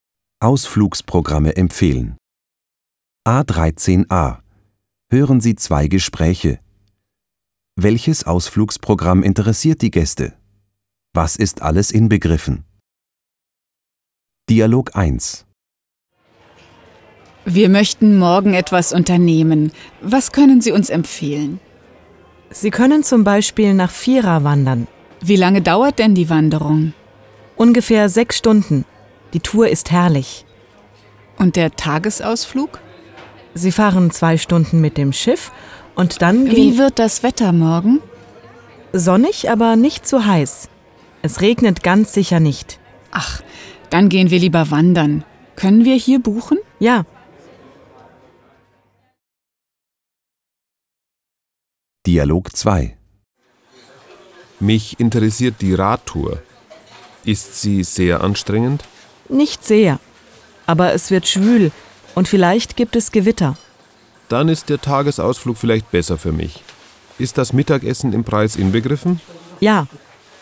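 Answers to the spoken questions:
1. Dialog 1: die Wanderung nach Fira; Dialog 2: zuerst die Radtour, dann der Tagesausflug
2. Das Mittagessen (beim Tagesausflug)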